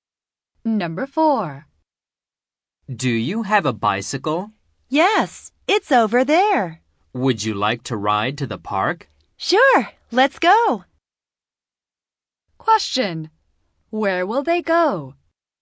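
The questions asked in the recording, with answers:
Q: Where will they go?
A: To the park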